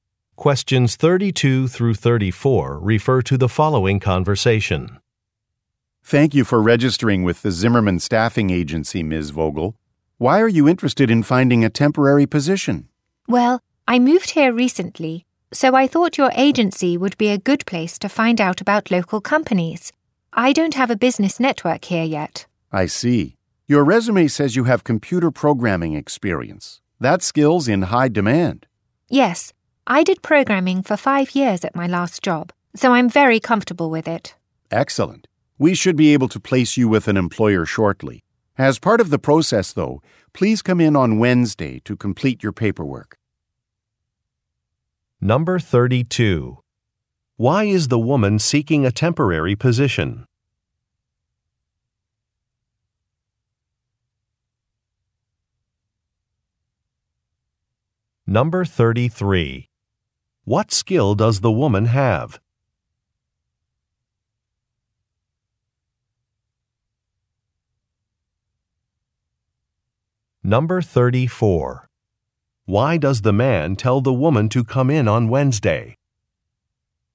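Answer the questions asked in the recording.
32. She moved recently and wants to learn about local companies
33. Computer programming
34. To complete her paperwork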